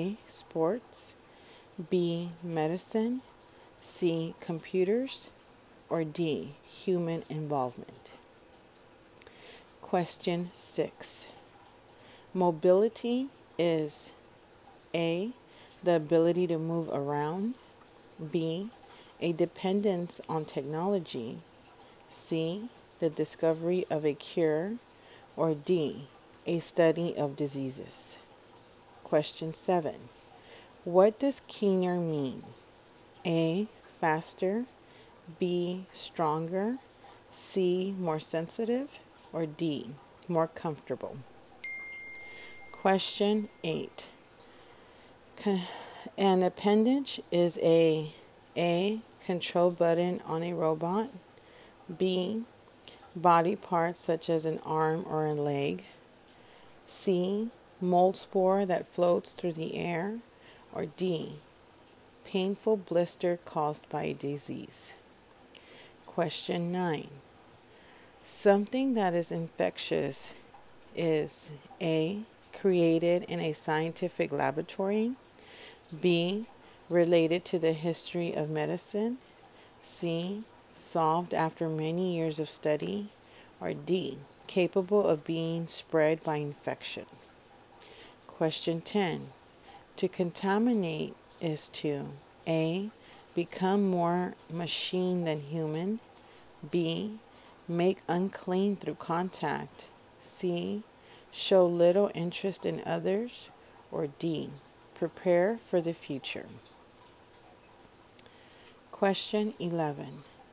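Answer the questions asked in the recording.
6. A: the ability to move around
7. C: more sensitive
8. B: body parts such as an arm or a leg
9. D: capable of being spread by infection
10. B: make unclean through contact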